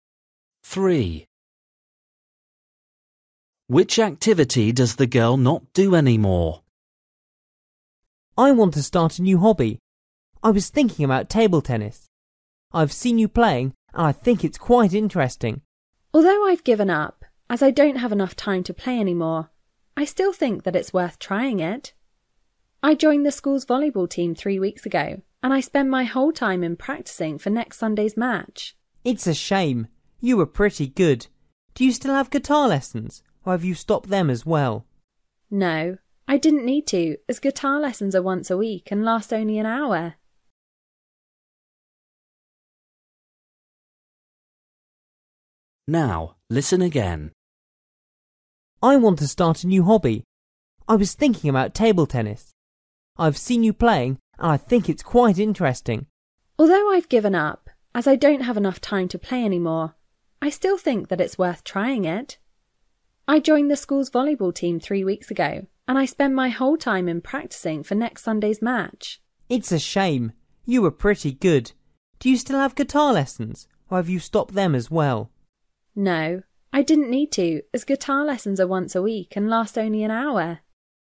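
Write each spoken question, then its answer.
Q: Which activity does the girl not do anymore?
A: table tennis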